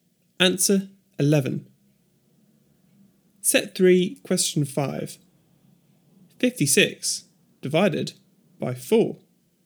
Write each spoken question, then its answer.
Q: 56 divided by 4.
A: 14.